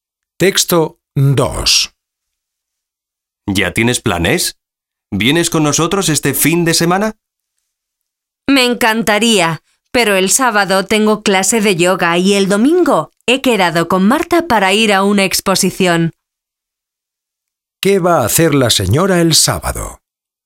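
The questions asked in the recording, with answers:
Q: ¿Qué va a hacer la señora el sábado?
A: Ir a clase de yoga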